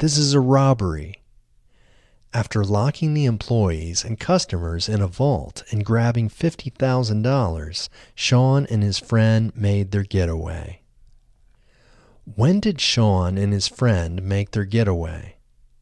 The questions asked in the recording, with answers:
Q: When did Sean and his friend make their getaway?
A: Sean and his friend made their getaway after locking the employees and customers in a vault and grabbing $50,000.